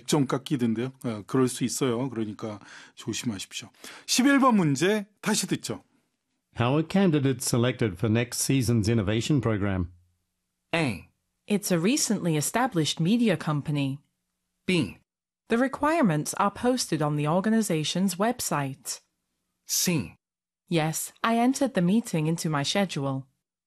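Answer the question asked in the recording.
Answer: B: The requirements are posted on the organization's website.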